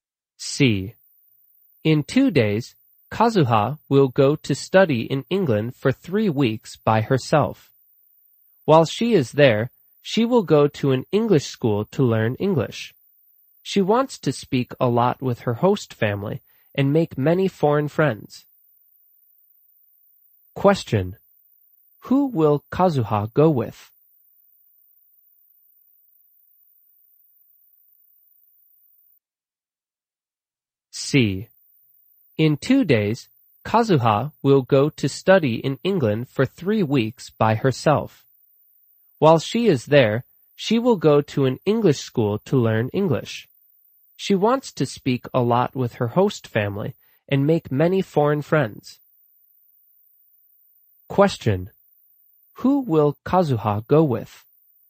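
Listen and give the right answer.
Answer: Nobody; she will go by herself.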